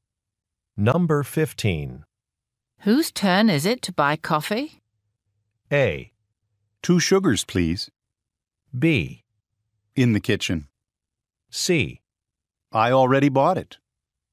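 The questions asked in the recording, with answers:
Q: Whose turn is it to buy coffee?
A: C: I already bought it.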